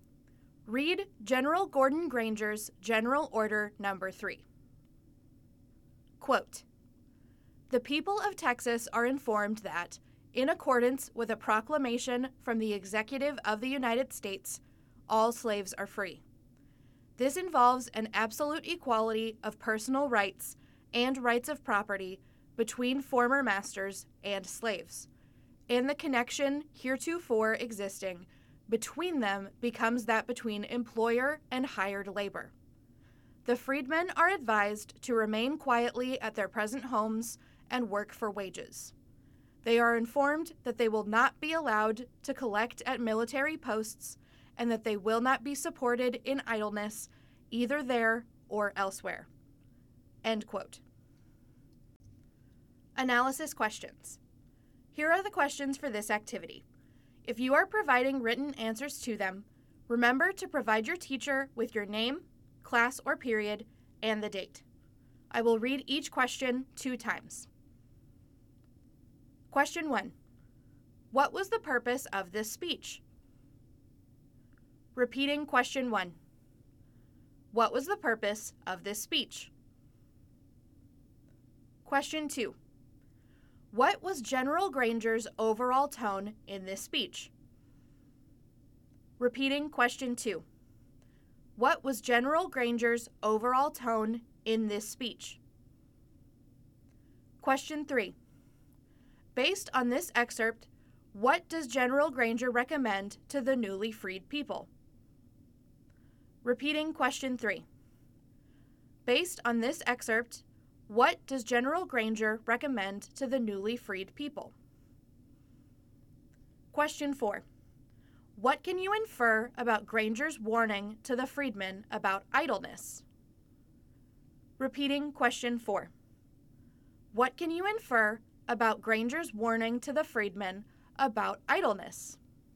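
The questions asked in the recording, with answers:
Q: What was the purpose of this speech?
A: To inform the people of Texas that all slaves are free

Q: Based on this excerpt, what does General Granger recommend to the newly freed people?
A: To remain quietly at their present homes and work for wages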